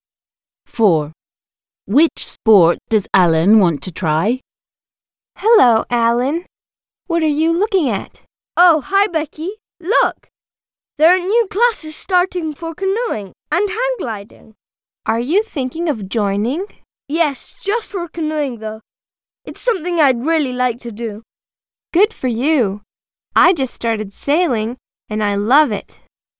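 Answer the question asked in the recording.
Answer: canoeing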